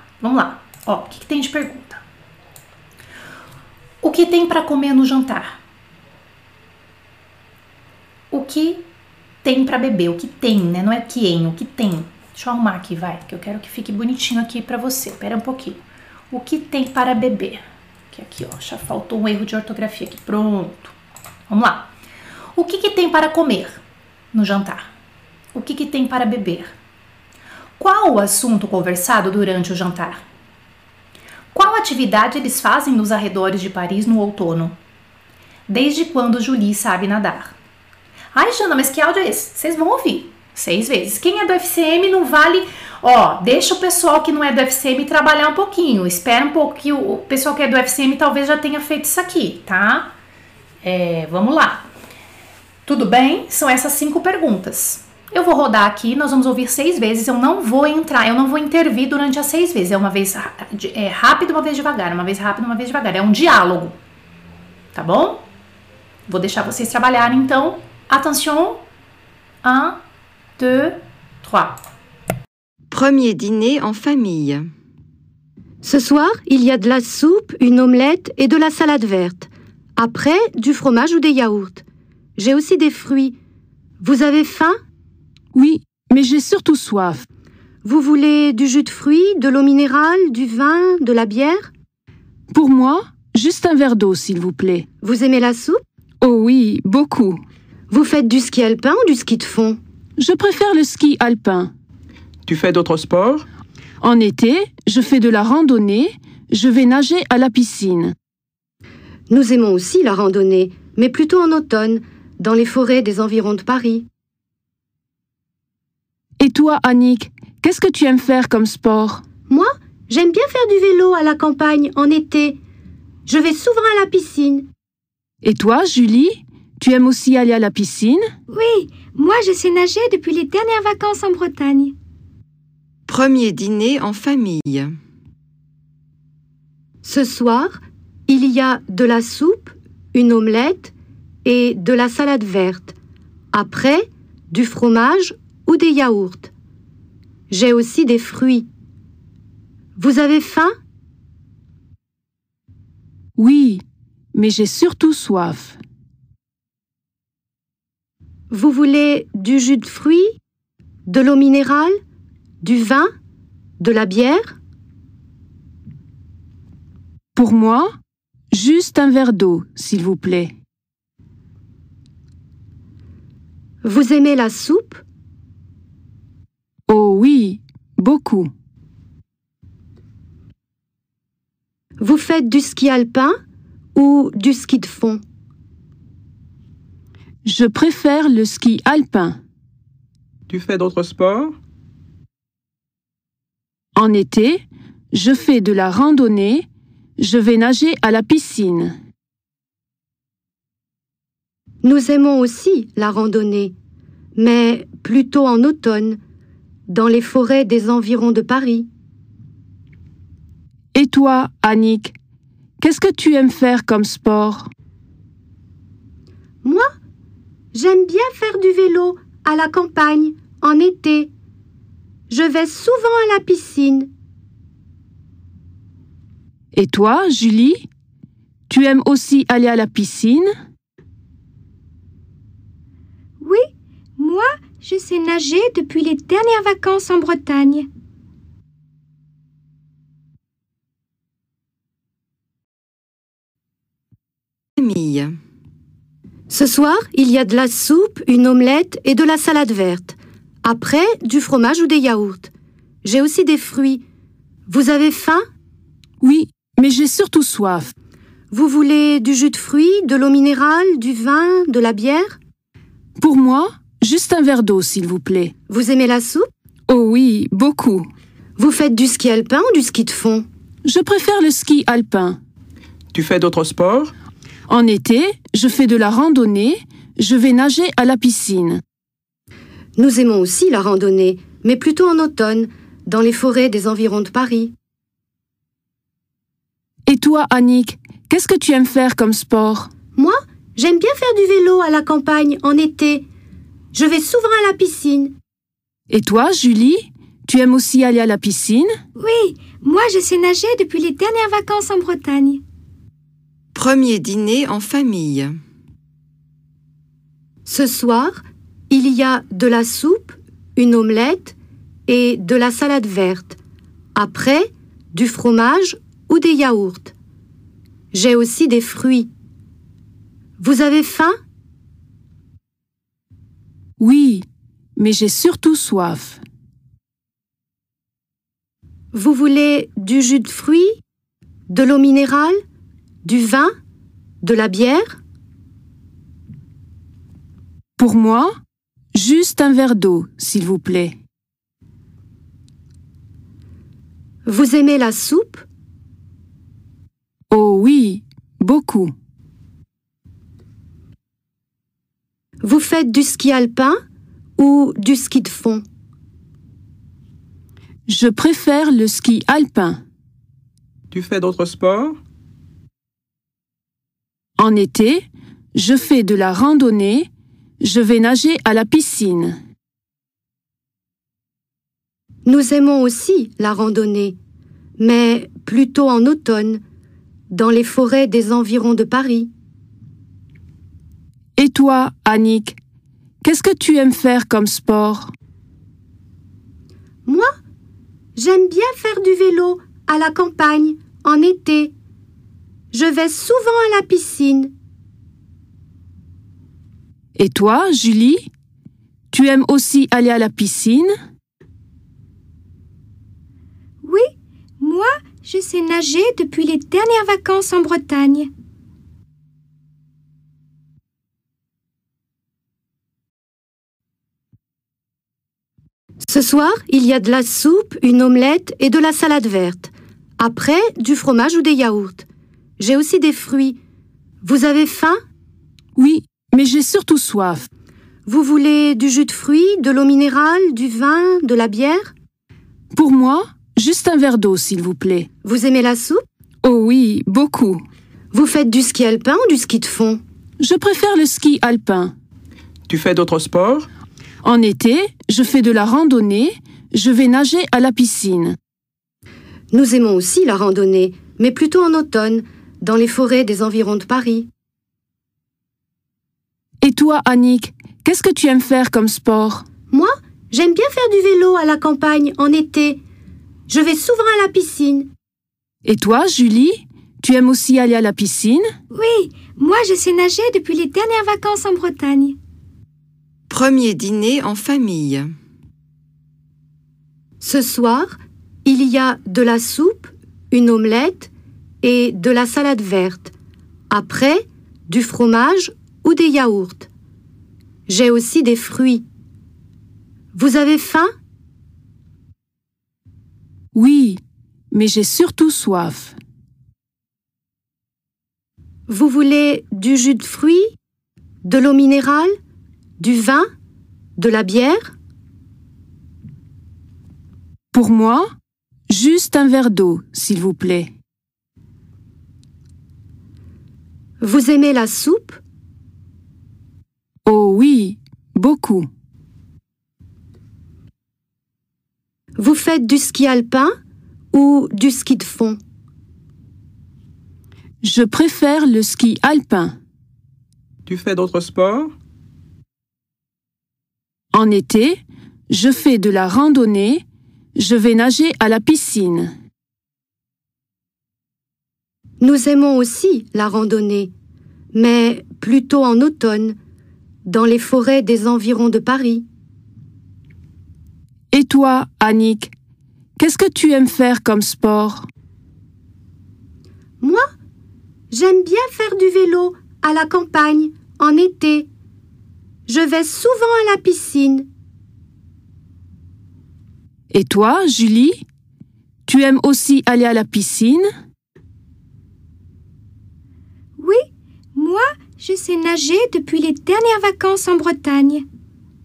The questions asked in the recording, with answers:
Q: O que tem para comer no jantar?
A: De la soupe, une omelette, de la salade verte.

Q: Qual o assunto conversado durante o jantar?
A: Ski, sport, activité sportive.

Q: Qual atividade eles fazem nos arredores de Paris no outono?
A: Randonnée, é très bien.

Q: Desde quando Julie sabe nadar?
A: Depuis les dernières vacances, desde as últimas férias.